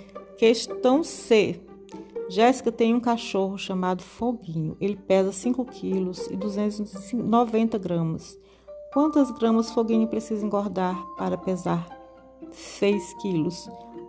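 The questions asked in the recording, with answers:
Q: Quantas gramas Foguinho precisa engordar para pesar 6 quilos?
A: 710 gramas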